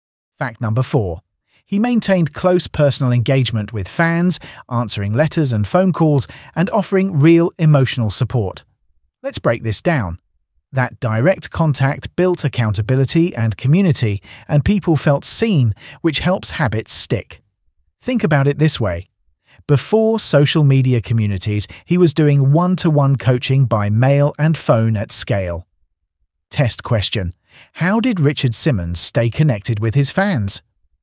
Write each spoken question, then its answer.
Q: How did Richard Simmons stay connected with his fans?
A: Correct answer, answering letters and calls.